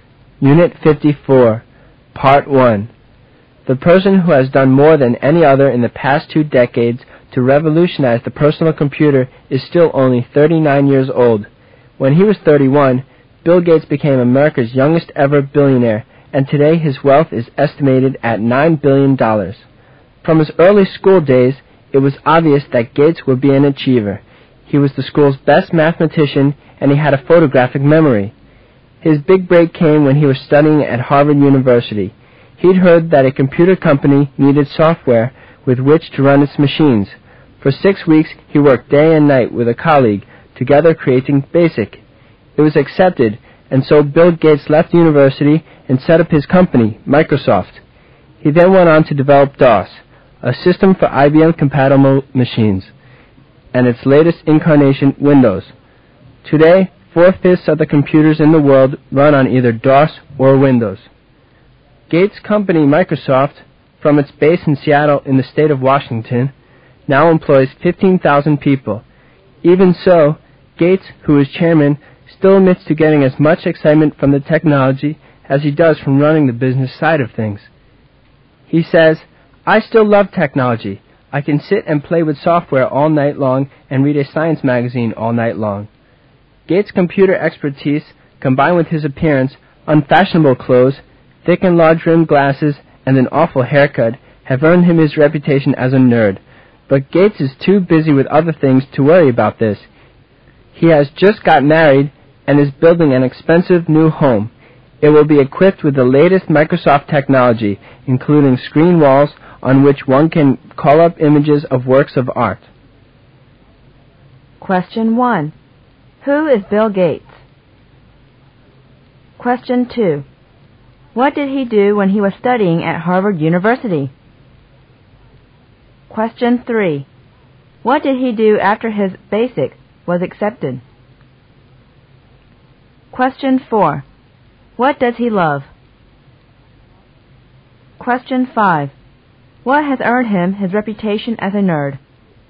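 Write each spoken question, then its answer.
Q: Who is Bill Gates?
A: Founder and chairman of Microsoft

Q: What did he do when he was studying at Harvard University?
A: Created the BASIC software with a colleague

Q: What did he do after his BASIC was accepted?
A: Left university and set up Microsoft

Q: What does he love?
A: Technology

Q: What has earned him his reputation as a nerd?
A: His computer expertise and his appearance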